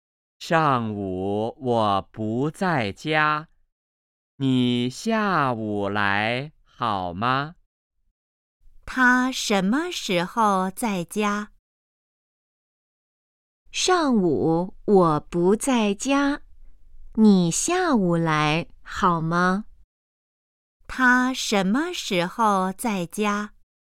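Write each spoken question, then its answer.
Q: 他什么时候在家?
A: 下午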